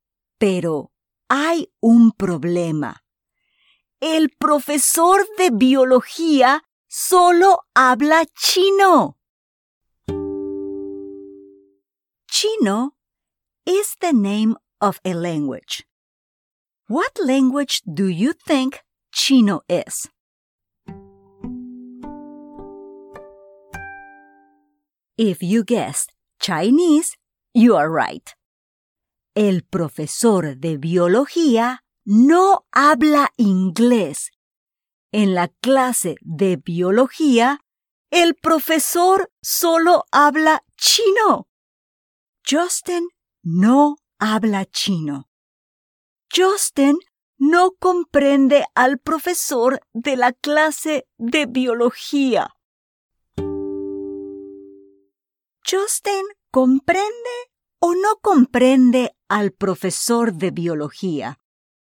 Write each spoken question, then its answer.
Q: ¿Justin comprende o no comprende al profesor de biología.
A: Tienes razón. Justin no comprende al profesor.